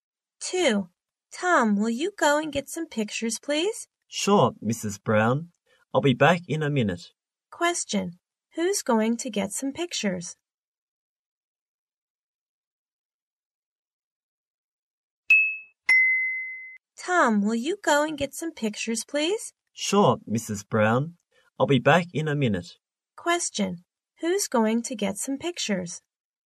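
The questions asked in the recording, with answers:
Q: who's going to get some pictures?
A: Tom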